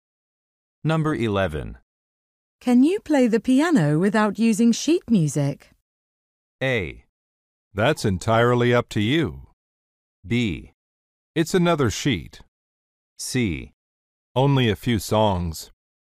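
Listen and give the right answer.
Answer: C: Only a few songs.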